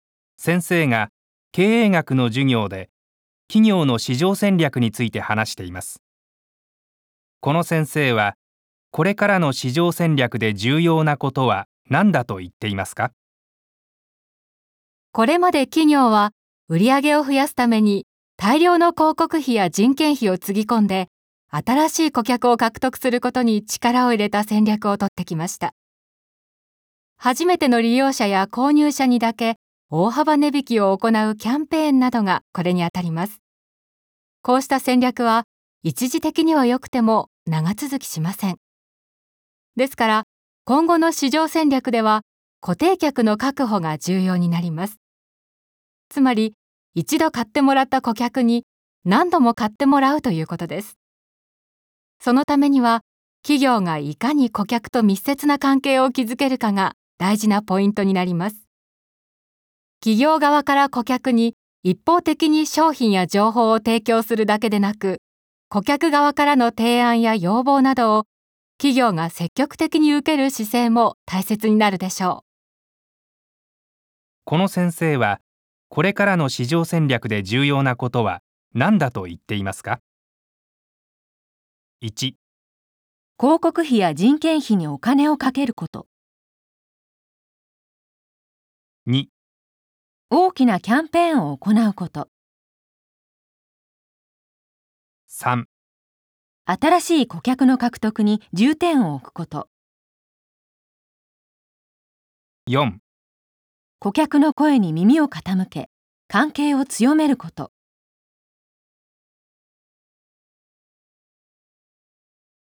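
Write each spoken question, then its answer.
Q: この先生はこれからの市場戦略で重要なことは何だと言っていますか?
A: 4: 顧客の声に耳を傾け関係を強めること。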